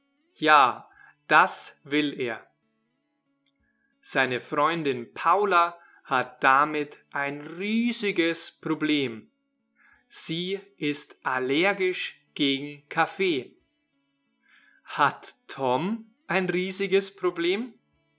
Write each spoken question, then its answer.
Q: Hat Tom ein riesiges Problem?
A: Nein, nicht Tom hat ein riesiges Problem, sondern Paula.